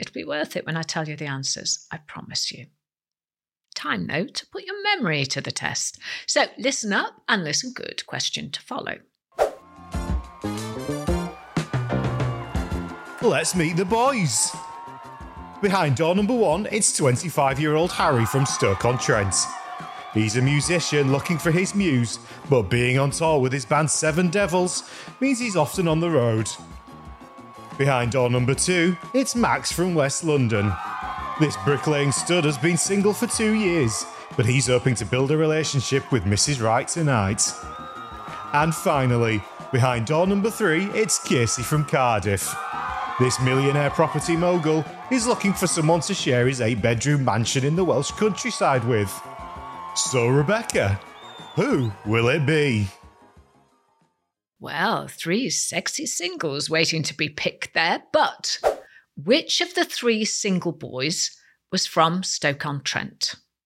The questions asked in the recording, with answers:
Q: but which of the three single boys was from Stoke-on-Trent?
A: And the answer was Harry.